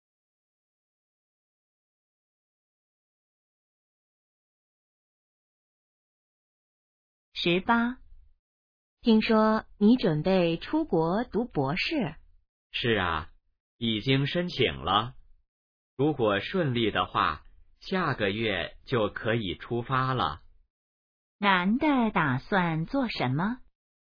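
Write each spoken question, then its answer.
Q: 男的打算做什么?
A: 出国读博士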